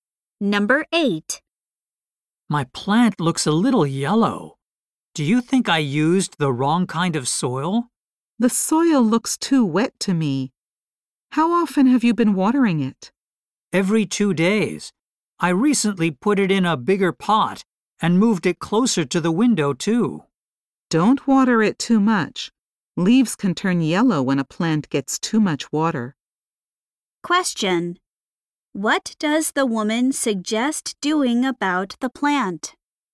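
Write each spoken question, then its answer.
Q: What does the woman suggest doing about the plant?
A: Watering it less.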